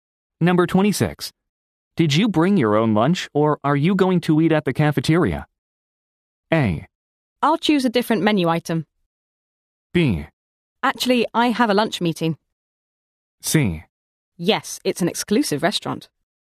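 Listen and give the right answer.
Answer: B: Actually, I have a lunch meeting.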